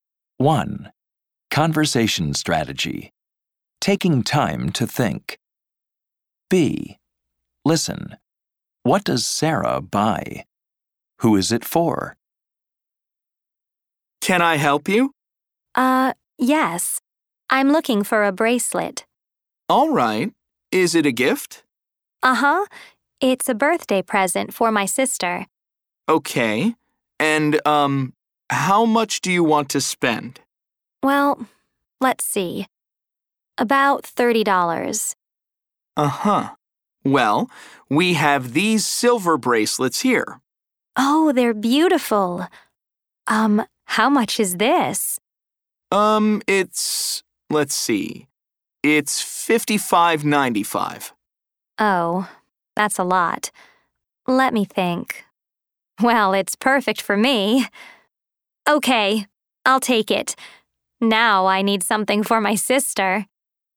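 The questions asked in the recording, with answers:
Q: What does Sarah buy?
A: A silver bracelet

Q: Who is it for?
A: Herself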